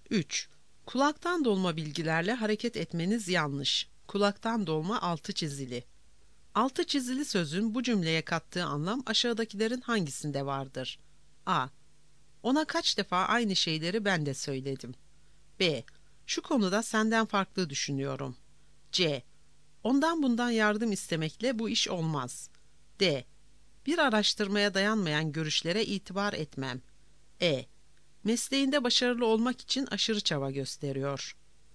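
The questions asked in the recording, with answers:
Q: Altı çizili sözün bu cümleye kattığı anlam aşağıdakilerin hangisinde vardır?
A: D: Bir araştırmaya dayanmayan görüşlere itibar etmem.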